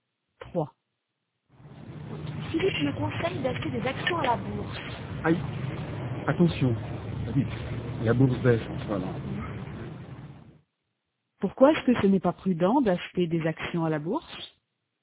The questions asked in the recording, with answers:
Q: Pourquoi est-ce que ce n'est pas prudent d'acheter des actions à la bourse?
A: Parce que la bourse baisse en ce moment.